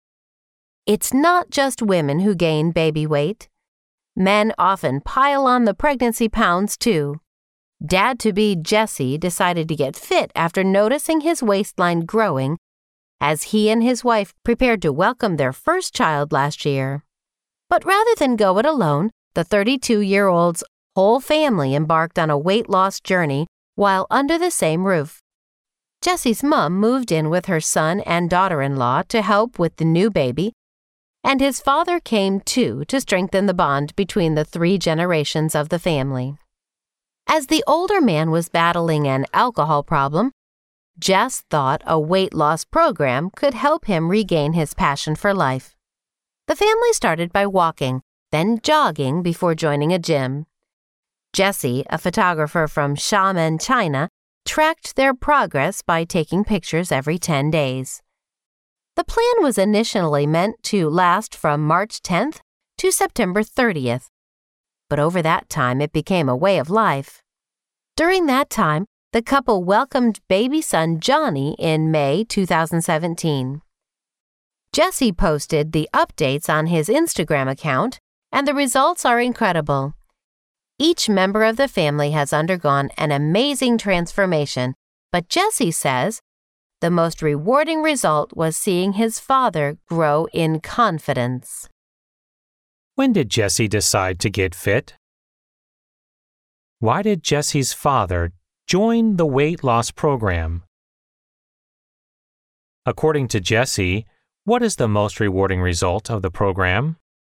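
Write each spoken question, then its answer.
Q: When did Jesse decide to get fit?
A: When he noticed his waistline growing as he and his wife prepared to welcome their first child

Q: Why did Jesse's father join the weight loss program?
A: To help him regain his passion for life while battling an alcohol problem

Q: According to Jesse, what is the most rewarding result of the program?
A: Seeing his father grow in confidence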